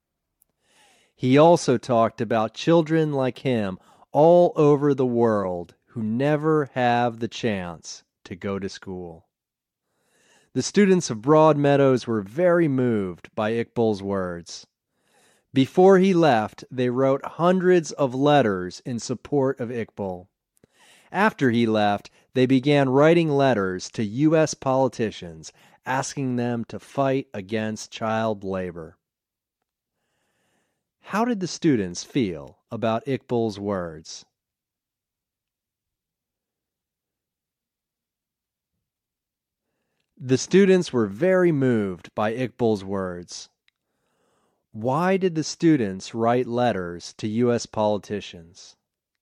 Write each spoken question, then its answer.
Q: Why did the students write letters to U.S. politicians?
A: The students wrote letters to U.S. politicians asking them to fight against child labor.